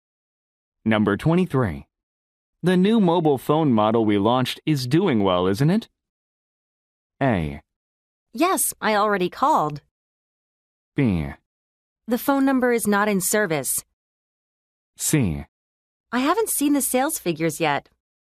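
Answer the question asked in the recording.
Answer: C: I haven't seen the sales figures yet.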